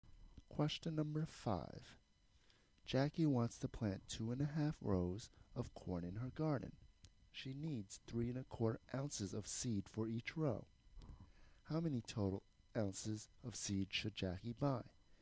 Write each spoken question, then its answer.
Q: How many total ounces of seed should Jackie buy?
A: 8 1/8